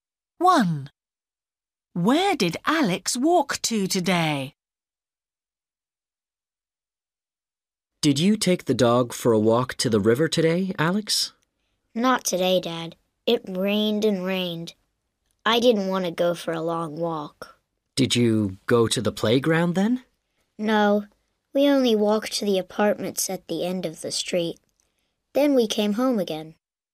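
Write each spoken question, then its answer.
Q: Where did Alex walk to today?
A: To the apartments at the end of the street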